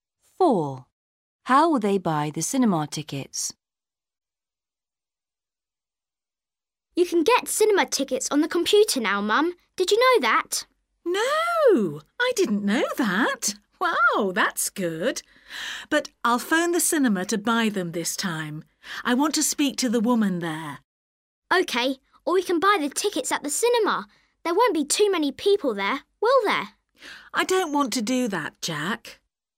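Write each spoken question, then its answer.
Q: How will they buy the cinema tickets?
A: By phoning the cinema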